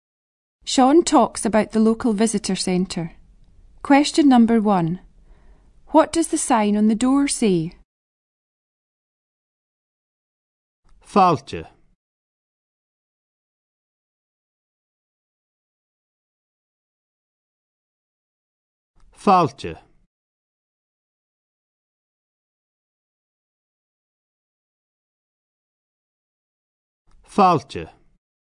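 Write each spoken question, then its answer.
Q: What does the sign on the door say?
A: Welcome (Fàilte)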